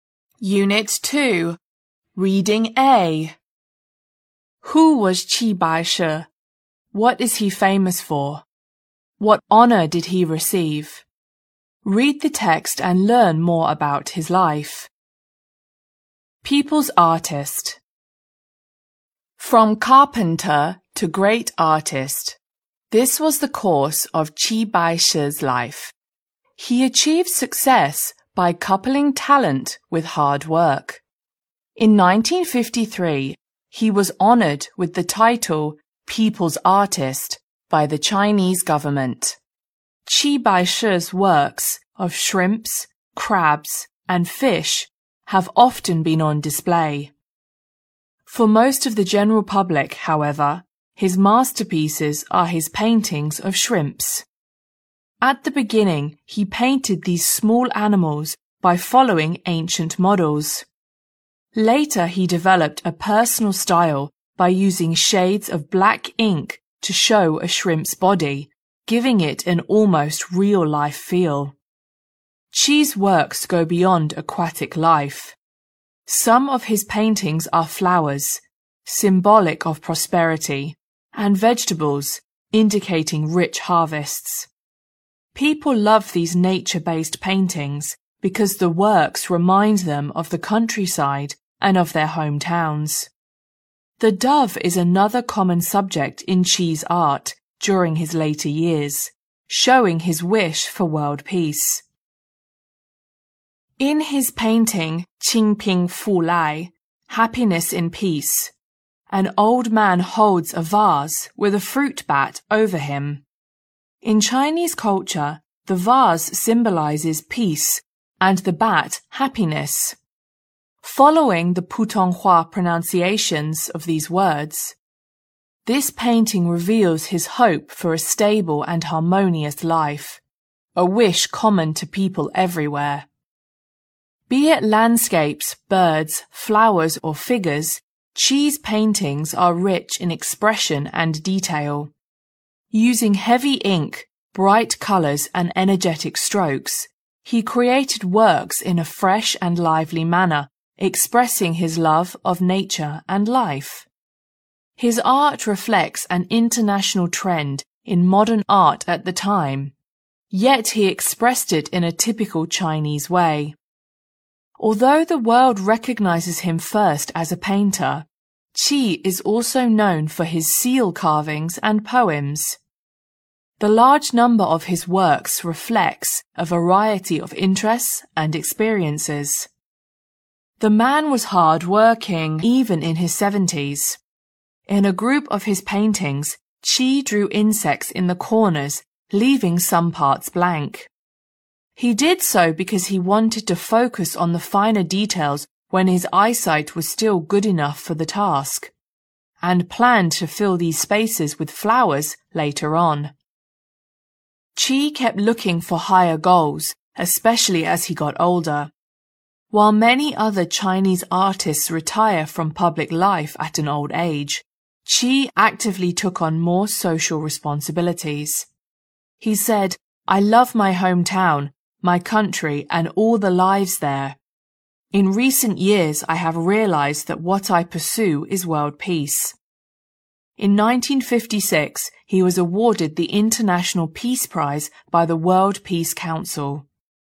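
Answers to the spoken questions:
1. A carpenter who became a great Chinese artist (painter)
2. His paintings, especially of shrimps
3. The title People's Artist (1953) and the International Peace Prize (1956)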